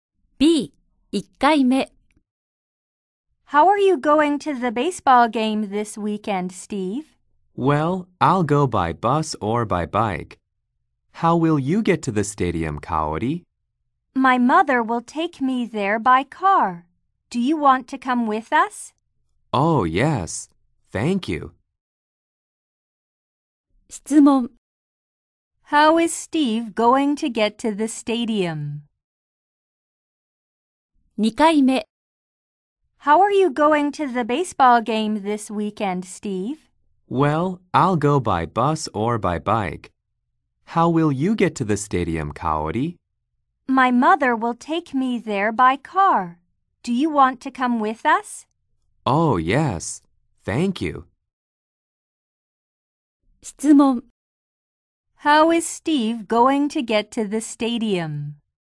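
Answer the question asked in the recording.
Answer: By car (with Kaori and her mother)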